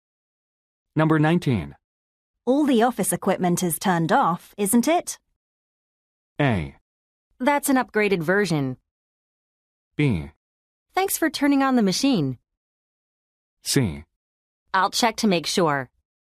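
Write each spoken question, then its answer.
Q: All the office equipment is turned off, isn't it?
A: C: I'll check to make sure.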